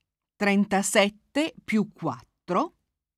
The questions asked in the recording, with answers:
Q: 37 più 4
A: fa 41.